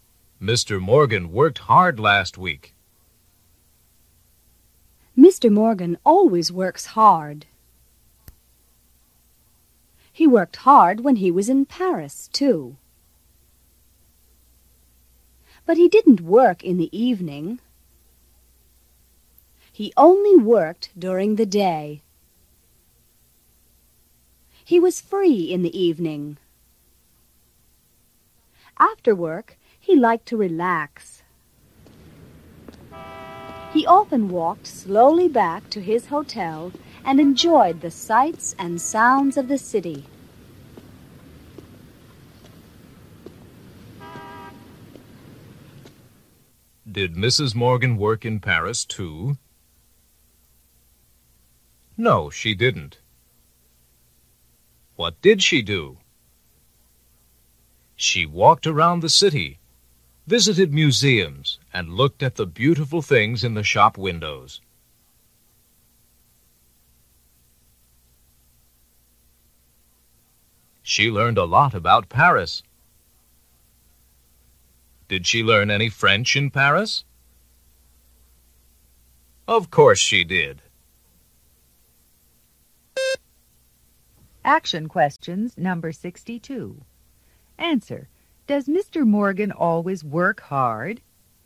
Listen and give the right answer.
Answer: Yes, he does.